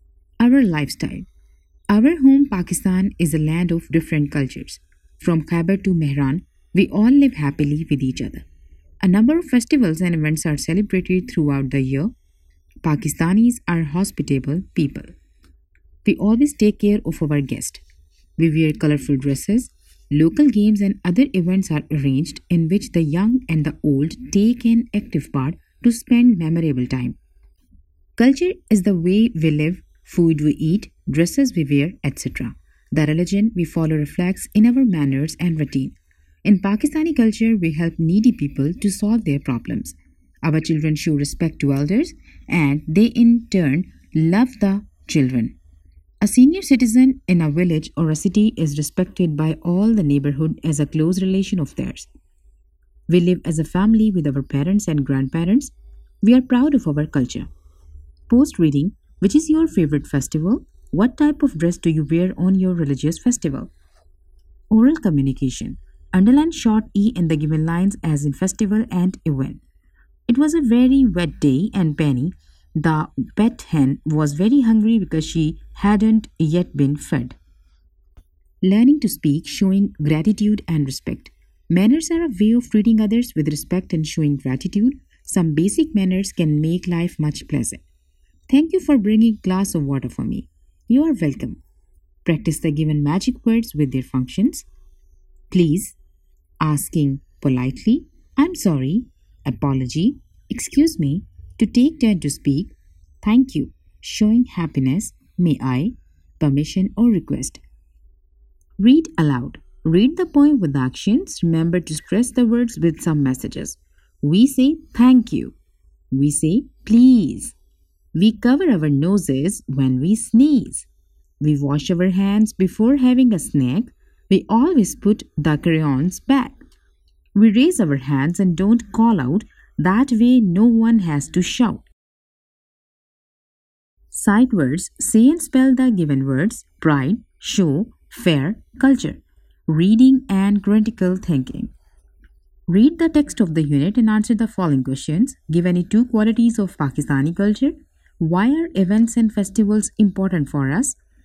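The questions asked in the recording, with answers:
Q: Give any two qualities of Pakistani culture.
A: Pakistanis are hospitable and take care of guests; they help needy people and respect elders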